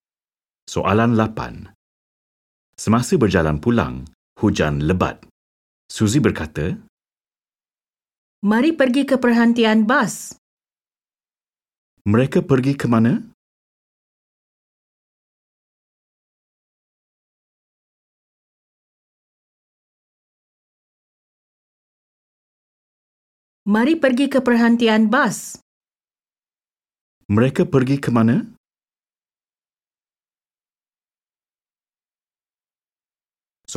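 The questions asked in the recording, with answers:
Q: Mereka pergi ke mana?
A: Perhentian bas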